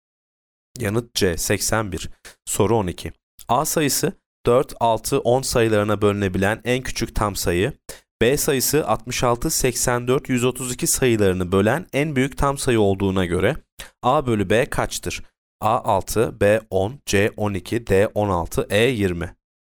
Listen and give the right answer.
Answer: Yanıt B 10.